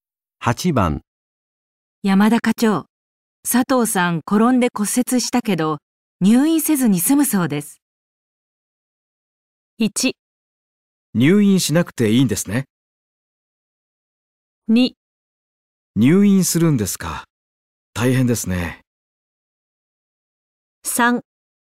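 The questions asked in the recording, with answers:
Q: 山田課長、佐藤さん転んで骨折したけど、入院せずに済むそうです。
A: 1: 入院しなくていいんですね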